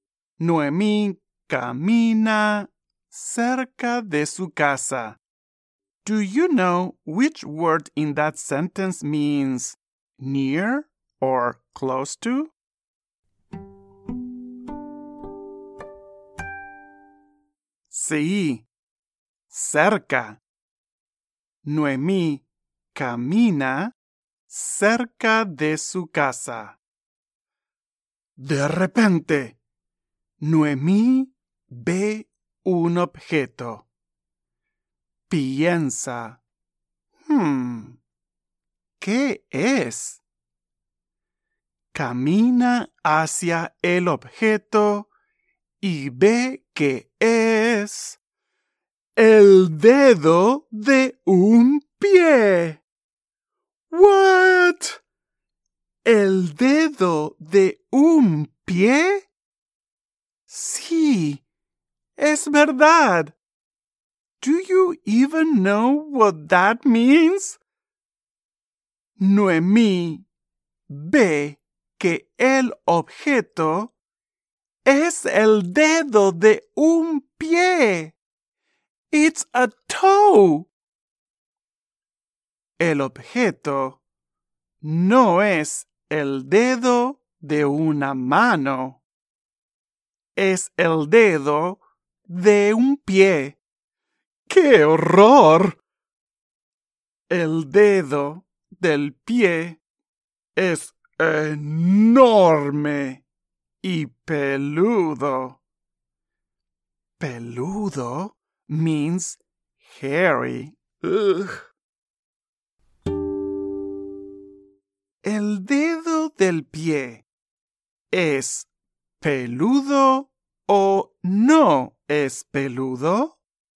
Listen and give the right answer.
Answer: Sí, es peludo.